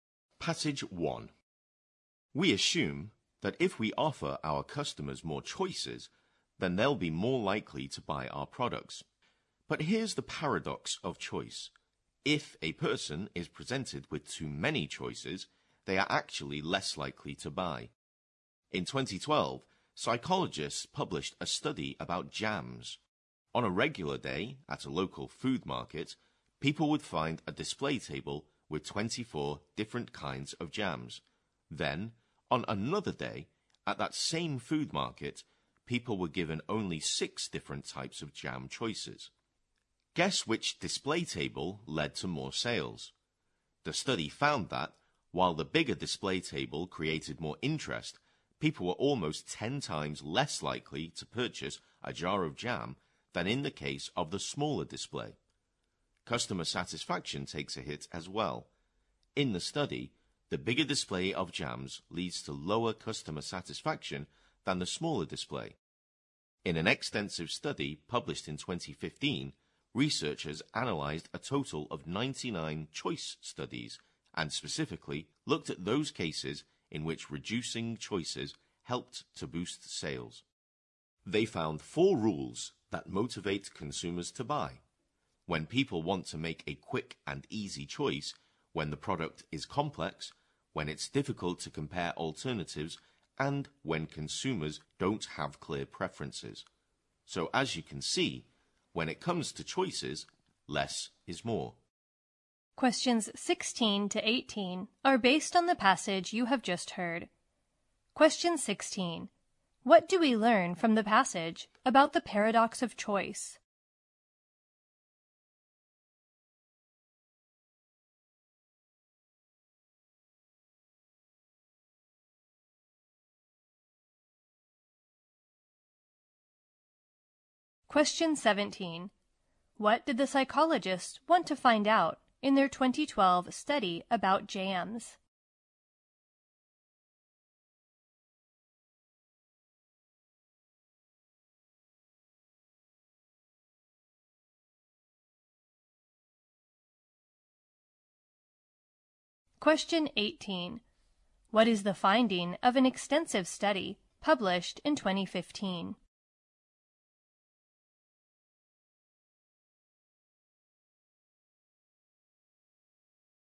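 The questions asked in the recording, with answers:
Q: What do we learn from the passage about the paradox of choice?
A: With too many choices people are less likely to buy

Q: What did the psychologists want to find out in their 2012 study about jams?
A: Whether more or fewer choices lead to more sales

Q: What is the finding of an extensive study published in 2015?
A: Four rules under which reducing choices motivates consumers to buy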